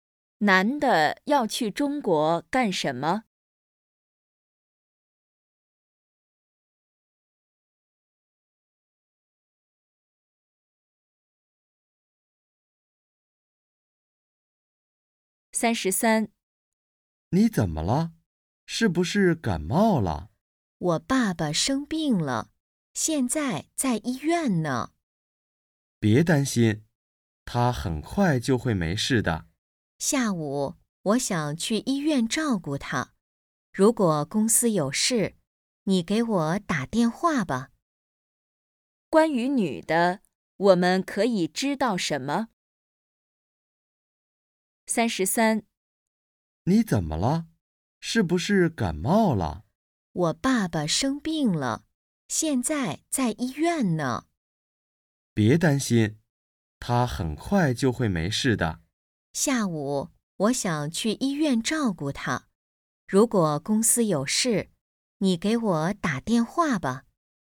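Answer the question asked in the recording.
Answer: 她爸爸生病了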